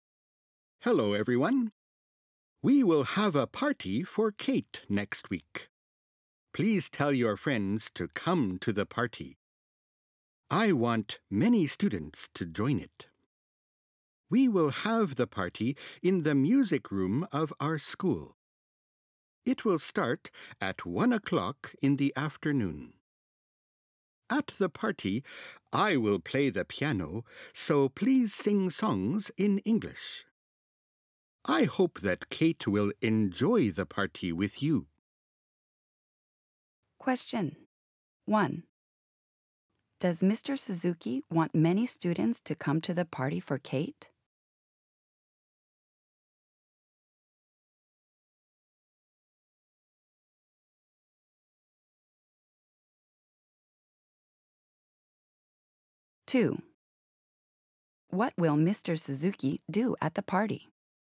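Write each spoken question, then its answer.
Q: Does Mr. Suzuki want many students to come to the party for Kate?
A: Yes, he does.

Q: What will Mr. Suzuki do at the party?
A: He will play the piano.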